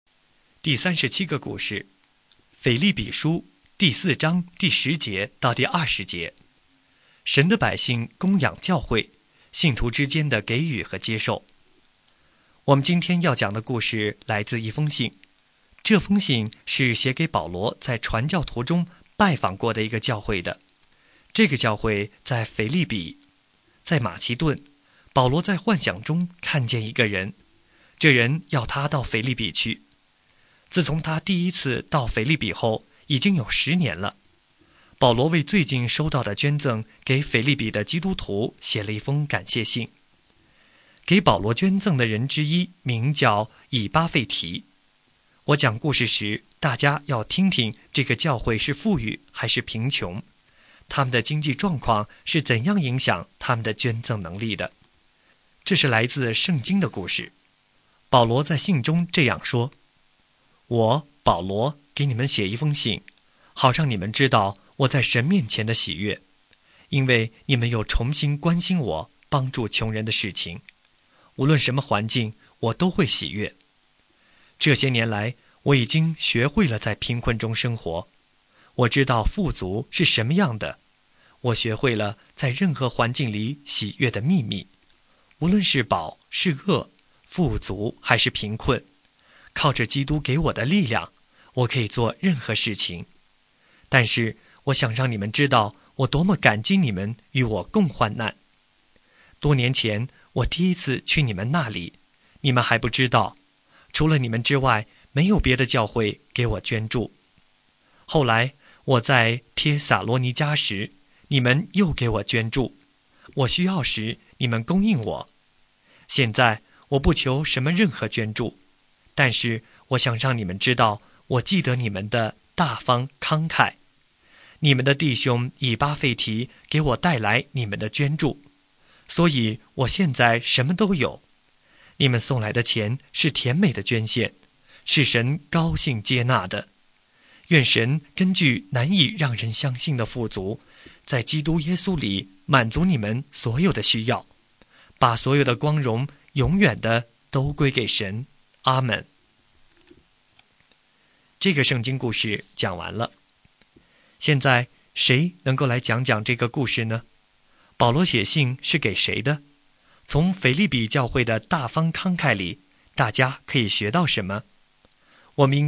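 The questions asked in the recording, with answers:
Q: 保罗写信是给谁的?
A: 腓立比教会的基督徒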